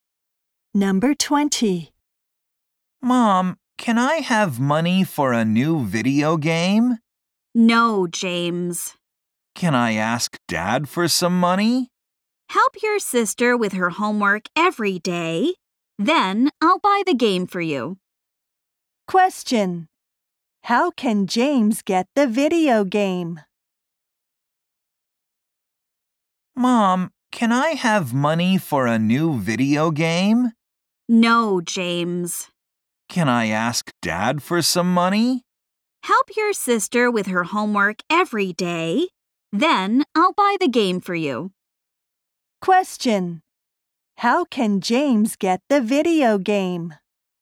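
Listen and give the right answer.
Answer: By helping his sister with her homework every day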